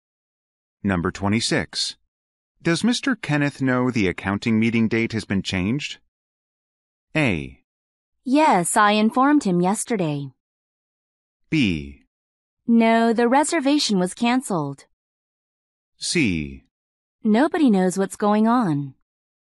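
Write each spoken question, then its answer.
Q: Does Mr. Kenneth know the accounting meeting date has been changed?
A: A: Yes, I informed him yesterday.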